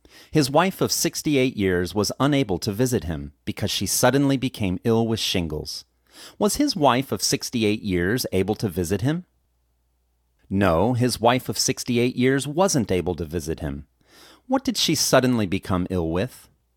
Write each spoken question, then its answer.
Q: What did she suddenly become ill with?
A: She suddenly became ill with shingles.